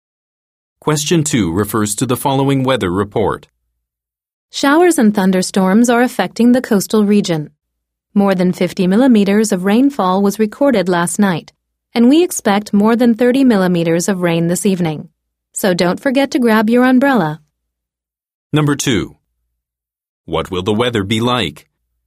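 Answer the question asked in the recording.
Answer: Rainy, with more than 30 millimeters of rain this evening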